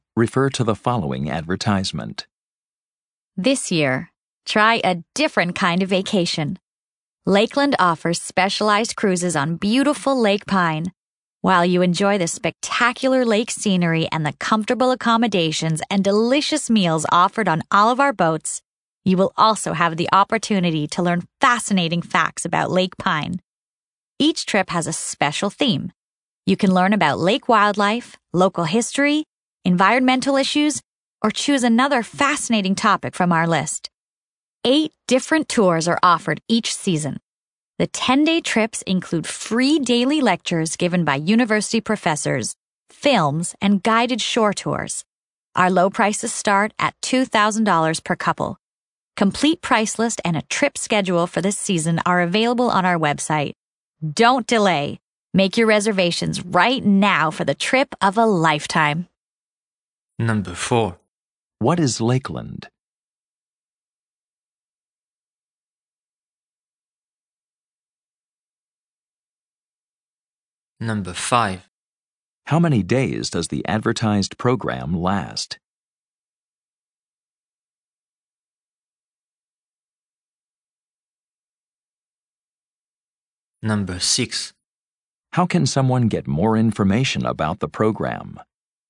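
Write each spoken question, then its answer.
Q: What is Lakeland?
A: A company offering specialized cruises on Lake Pine

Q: How many days does the advertised program last?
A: 10 days

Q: How can someone get more information about the program?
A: By visiting the website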